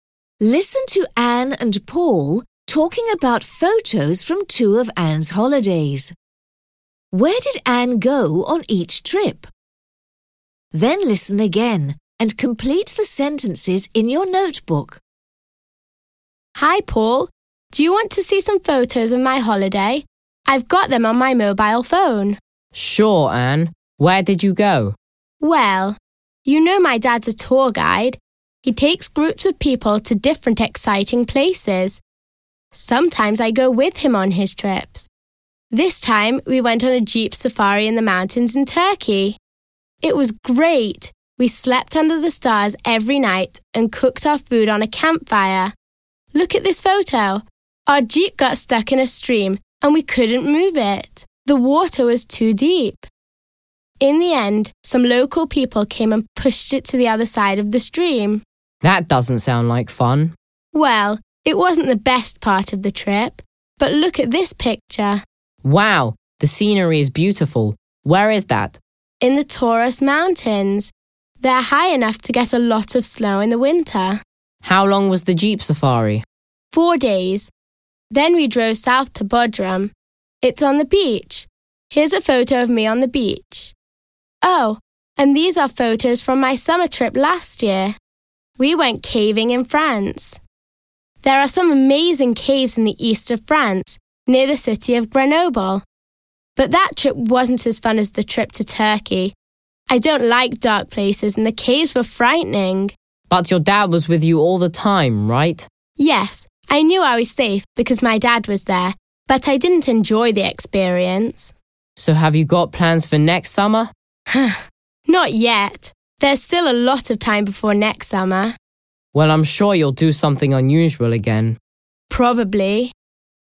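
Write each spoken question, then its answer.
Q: Where did Anne go on each trip?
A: Turkey (jeep safari in the Taurus Mountains, then Bodrum) and France (caving near Grenoble)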